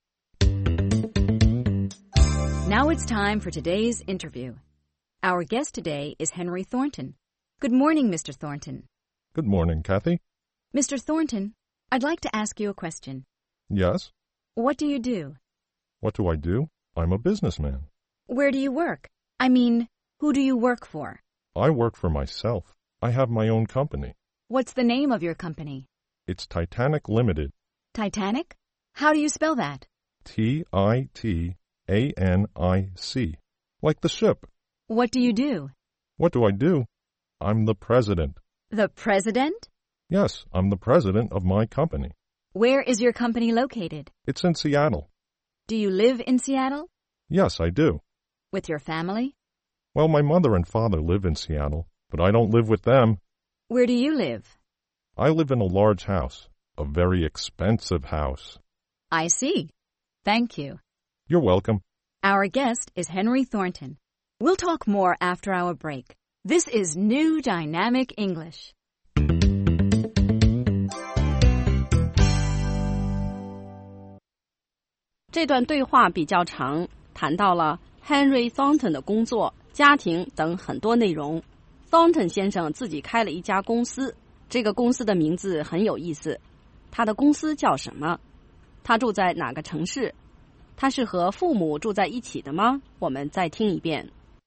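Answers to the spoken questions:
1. Henry 的公司叫 Titanic Limited
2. 西雅图(Seattle)
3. 不是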